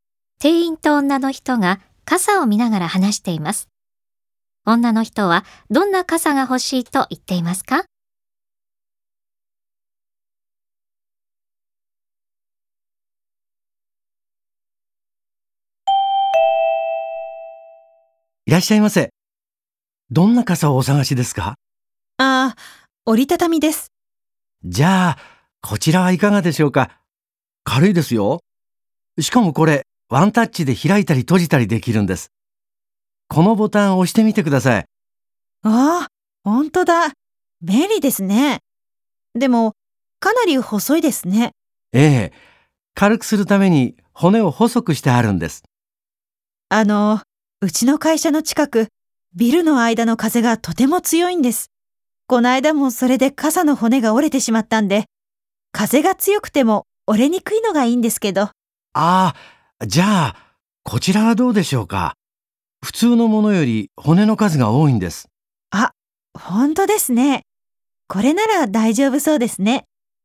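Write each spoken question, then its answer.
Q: 女の人はどんな傘が欲しいと言っていますか?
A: 風が強くても折れにくい折りたたみ傘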